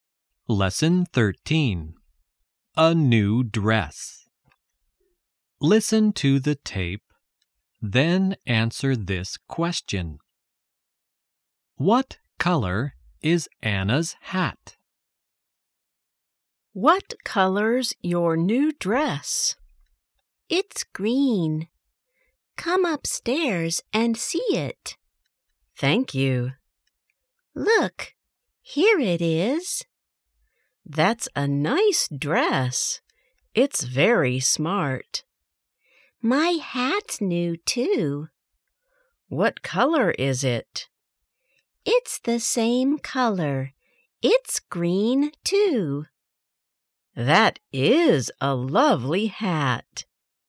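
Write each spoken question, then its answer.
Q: What color is Anna's hat?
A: Green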